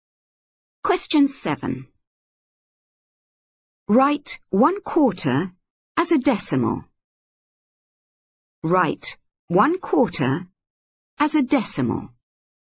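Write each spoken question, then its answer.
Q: Write 1/4 as a decimal.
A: 0.25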